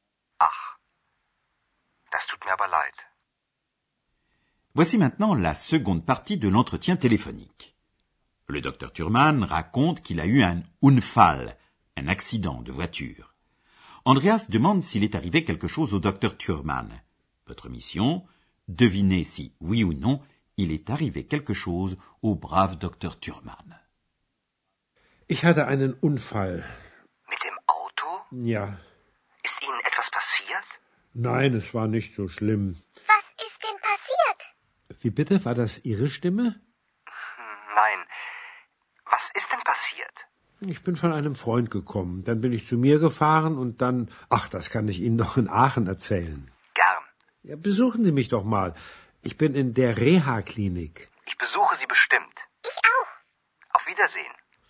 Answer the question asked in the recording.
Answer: Alors, oui, il n'est rien arrivé de très grave au docteur Thurman.